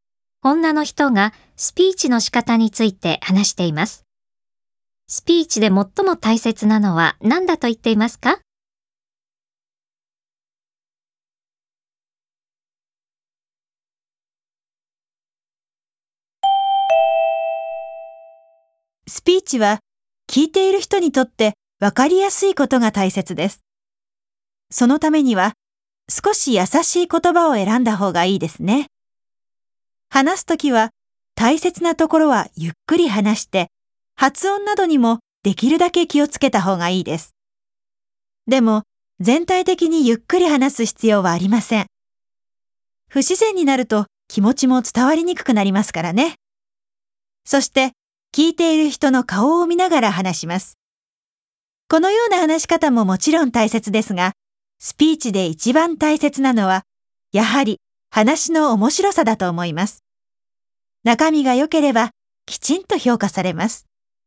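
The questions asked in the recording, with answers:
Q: スピーチで最も大切なのは何だと言っていますか?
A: 話の面白さ(中身)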